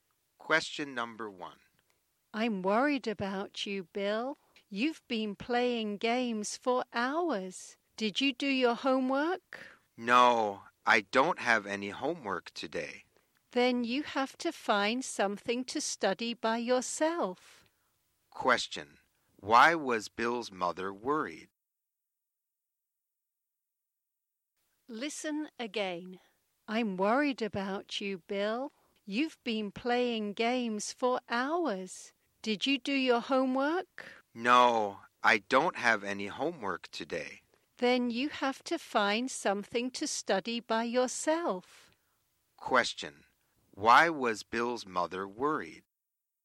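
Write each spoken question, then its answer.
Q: Why was Bill's mother worried?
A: Because he had been playing games for hours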